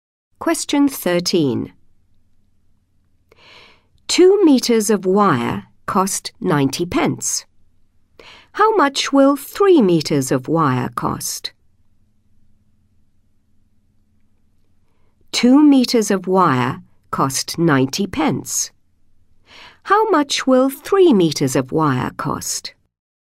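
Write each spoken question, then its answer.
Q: How much will 3 meters of wire cost?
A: £1.35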